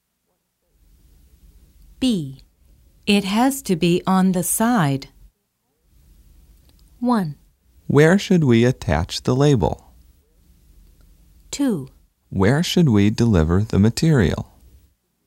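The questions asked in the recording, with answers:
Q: It has to be on the side.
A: 1: Where should we attach the label?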